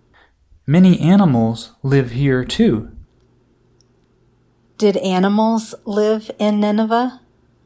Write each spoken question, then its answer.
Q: Did animals live in Nineveh?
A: Yes, animals lived in Nineveh.